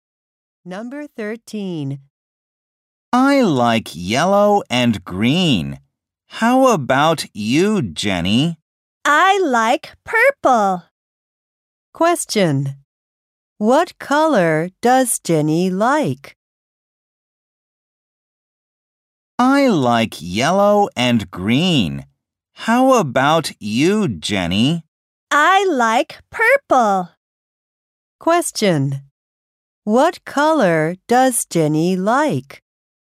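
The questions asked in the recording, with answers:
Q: What color does Jenny like?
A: Purple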